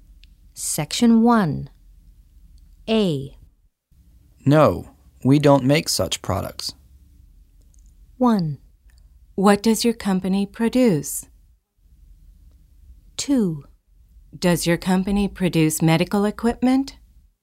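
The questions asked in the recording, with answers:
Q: Find the correct question or statement.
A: 2: Does your company produce medical equipment?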